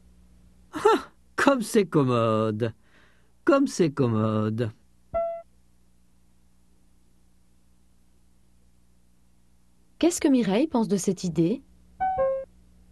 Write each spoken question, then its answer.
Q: Qu'est-ce que Mireille pense de cette idée?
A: Elle pense que c'est commode.